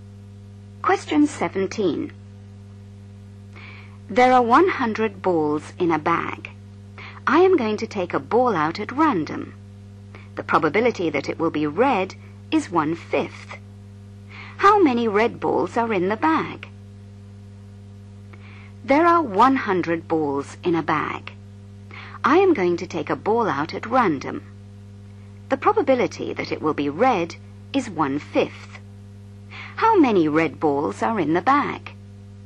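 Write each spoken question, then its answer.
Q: How many red balls are in the bag?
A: 20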